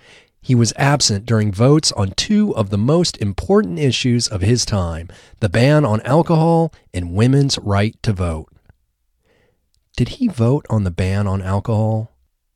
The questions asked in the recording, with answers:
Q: Did he vote on the ban on alcohol?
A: No, he didn't vote on the ban on alcohol.